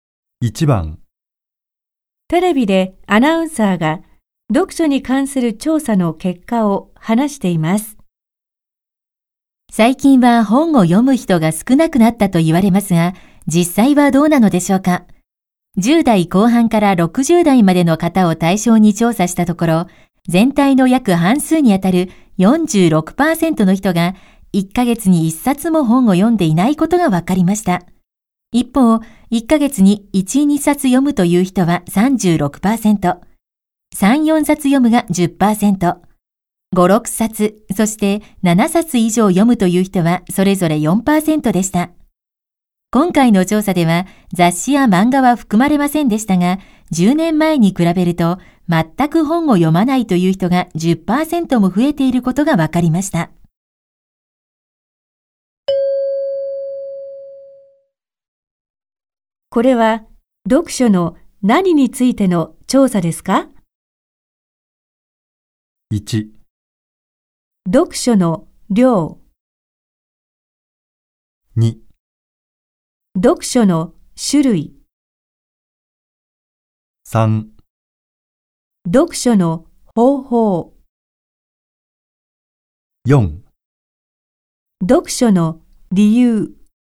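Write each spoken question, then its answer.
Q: これは読書の何についての調査ですか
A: 1: 読書の量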